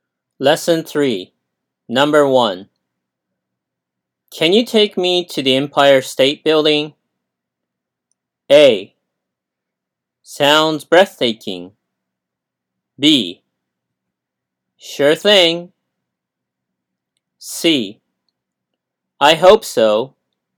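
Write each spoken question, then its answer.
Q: Can you take me to the Empire State Building?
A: B: Sure thing.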